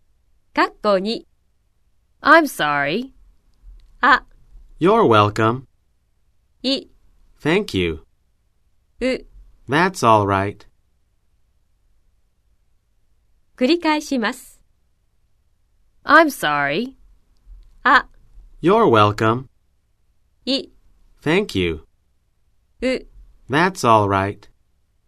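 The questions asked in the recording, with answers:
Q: I'm sorry.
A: う: That's all right.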